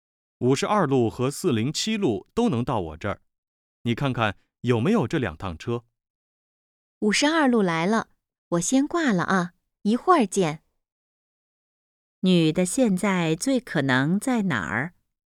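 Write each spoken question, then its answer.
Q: 女的现在最可能在哪儿?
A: 公交车站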